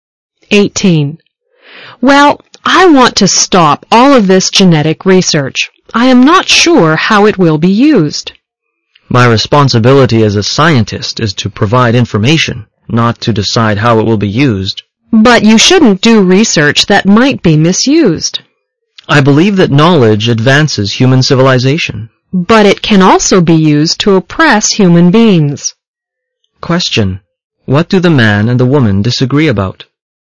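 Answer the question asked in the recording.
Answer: Whether genetic research should be stopped because it might be misused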